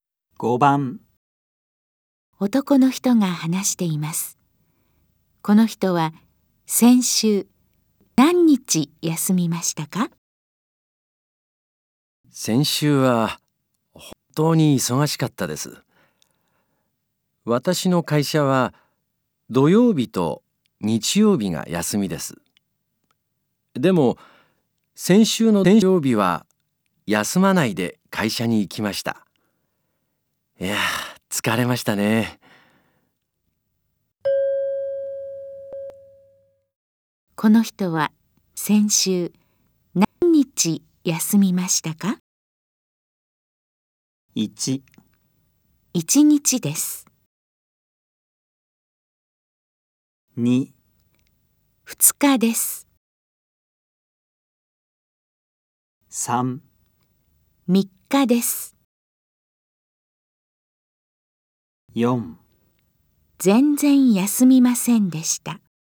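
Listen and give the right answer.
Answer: 1: 1日です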